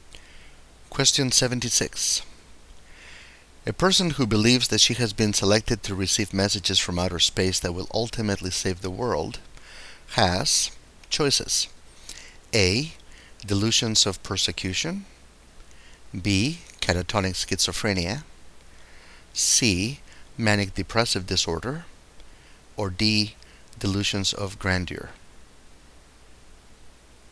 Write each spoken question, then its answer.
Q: A person who believes that she has been selected to receive messages from outer space that will ultimately save the world has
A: And the correct answer here is D.